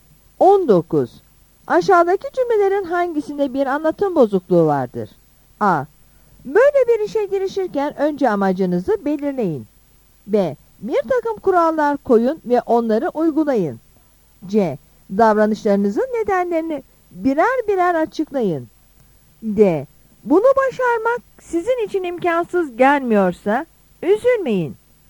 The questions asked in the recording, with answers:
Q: Aşağıdaki cümlelerin hangisinde bir anlatım bozukluğu vardır?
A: Yanıt D'dir.